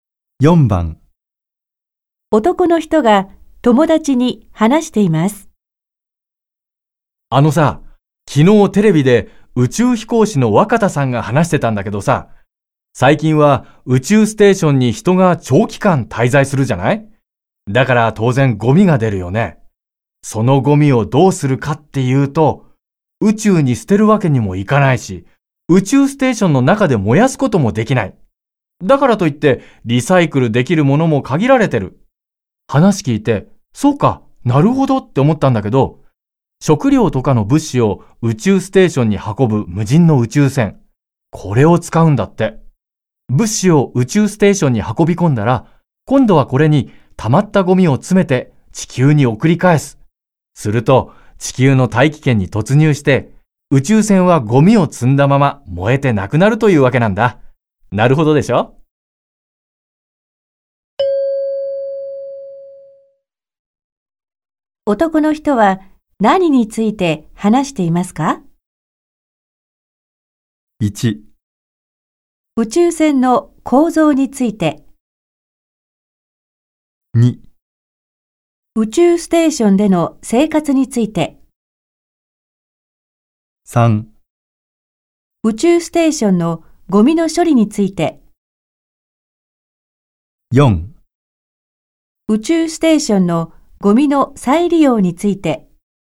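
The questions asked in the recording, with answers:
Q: 男の人は何について話していますか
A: 3: 宇宙ステーションのゴミの処理について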